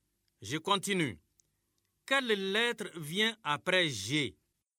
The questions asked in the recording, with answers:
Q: Quelle lettre vient après G?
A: Monsieur, c'est H.